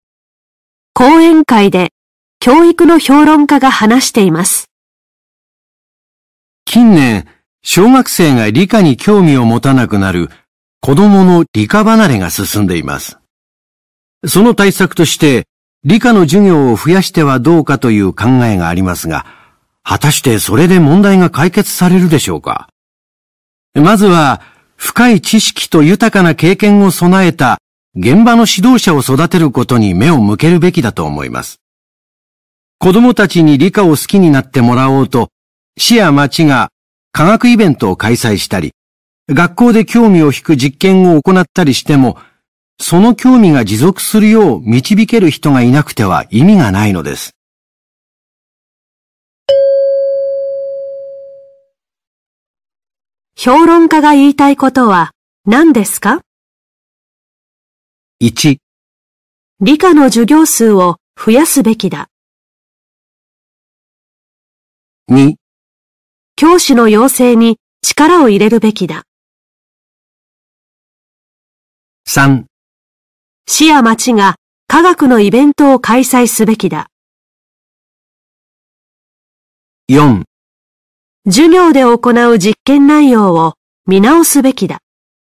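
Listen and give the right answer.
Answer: 2: 教師の養成に力を入れるべきだ。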